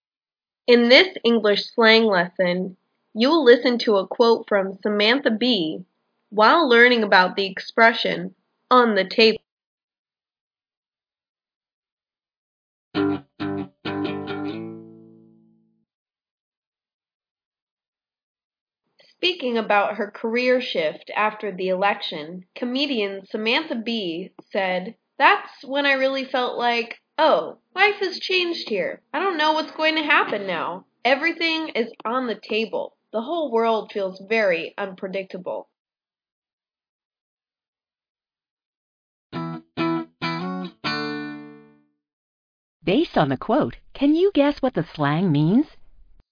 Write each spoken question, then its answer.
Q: Based on the quote, can you guess what the slang means?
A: On the table is an expression meaning to be discussed, up for negotiation, change.